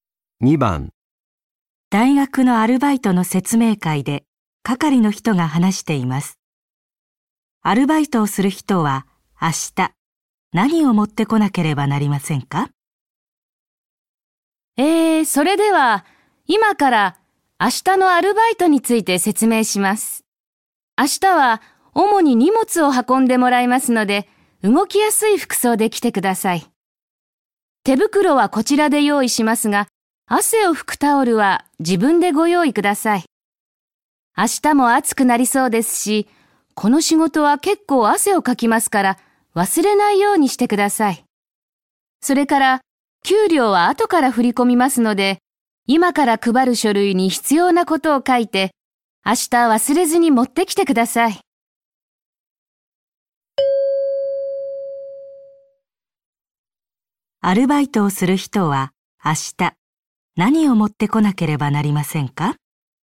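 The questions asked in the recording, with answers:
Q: アルバイトをする人は明日何を持ってこなければなりませんか?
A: 汗を拭くタオルと記入した書類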